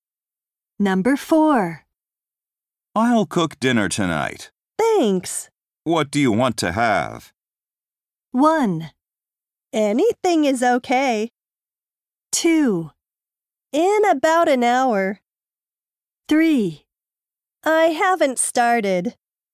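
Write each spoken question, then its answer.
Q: What do you want to have?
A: 1: Anything is okay.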